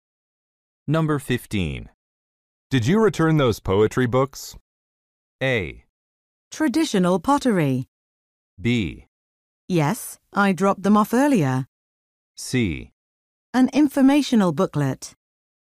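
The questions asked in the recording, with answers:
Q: Did you return those poetry books?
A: B: Yes, I dropped them off earlier.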